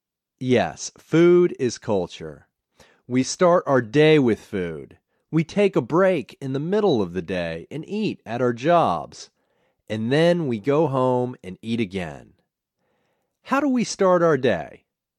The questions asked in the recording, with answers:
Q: How do we start our day?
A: We start our day with food.